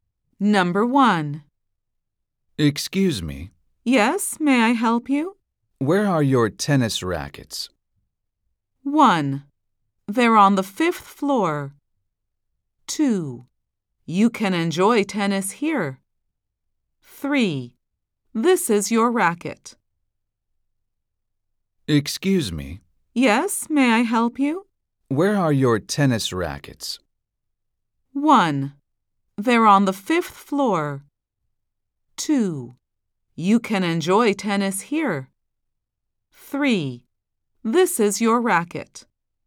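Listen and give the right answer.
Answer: 1: They're on the 5th floor.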